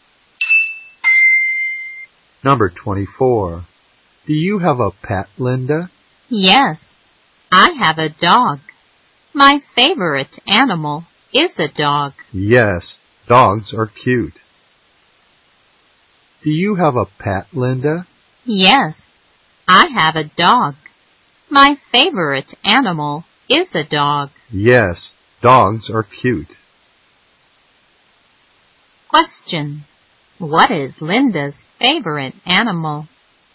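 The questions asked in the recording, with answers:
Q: What is Linda's favorite animal?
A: A dog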